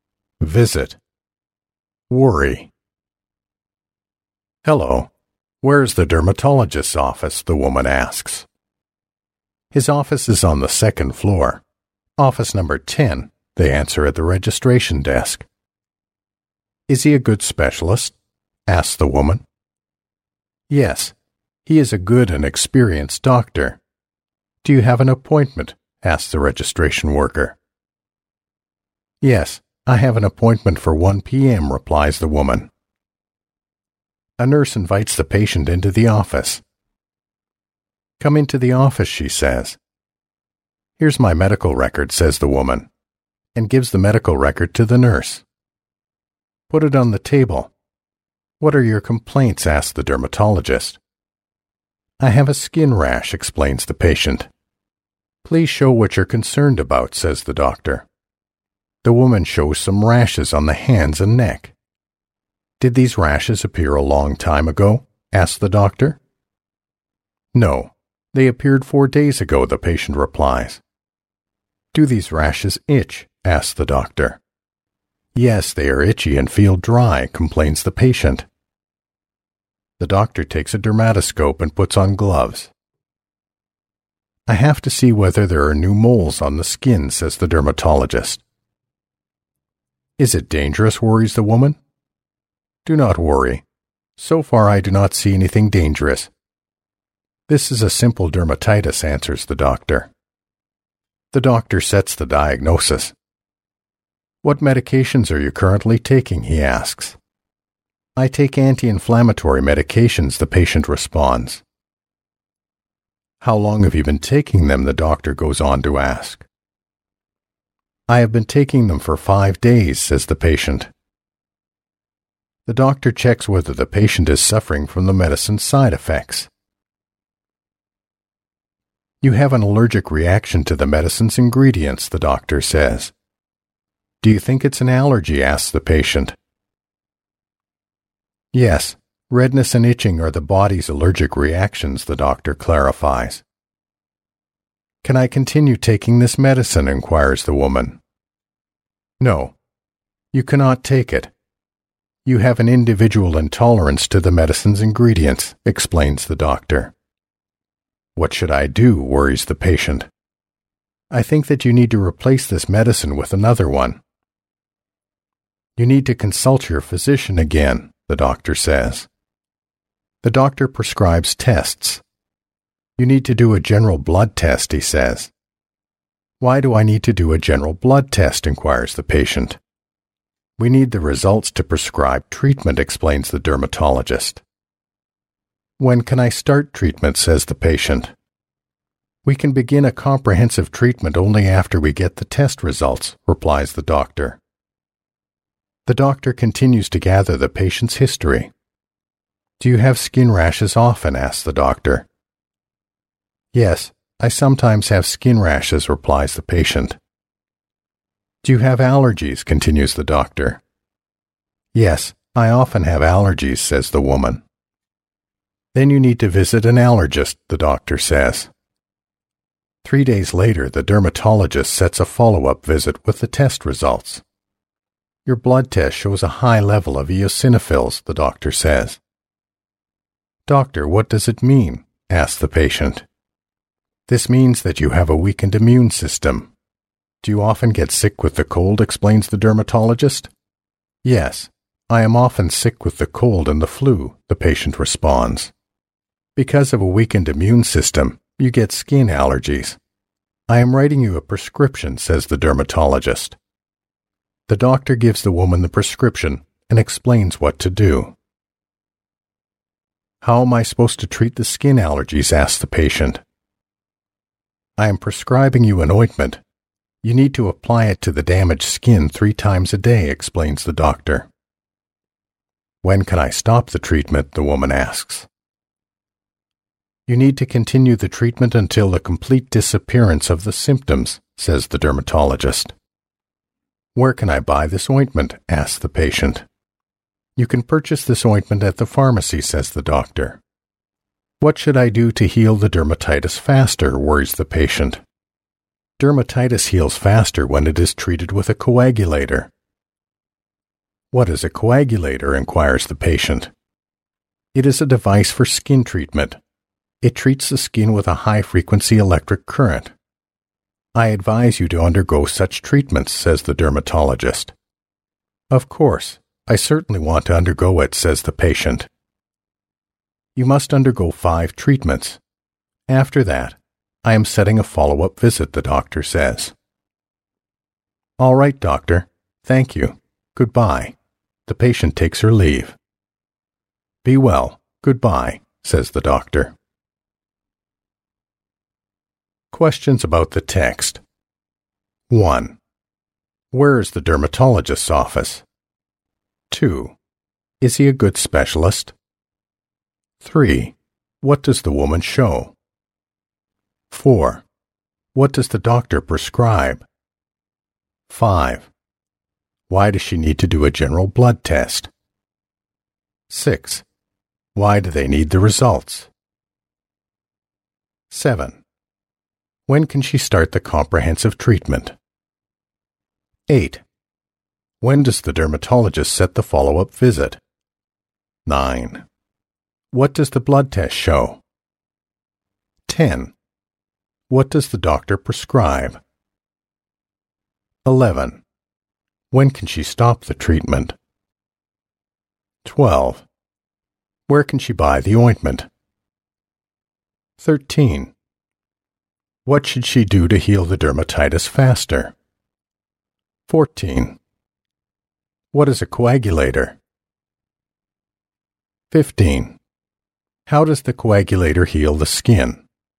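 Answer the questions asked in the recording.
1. On the second floor, office number 10
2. Yes, he is a good and experienced doctor
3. Some rashes on the hands and neck
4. Tests (a general blood test)
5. They need the results to prescribe treatment
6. To prescribe treatment
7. Only after they get the test results
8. 3 days later
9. A high level of eosinophils
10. An ointment
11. When the symptoms have completely disappeared
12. At the pharmacy
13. Have it treated with a coagulator
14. A device for skin treatment
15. It treats the skin with a high-frequency electric current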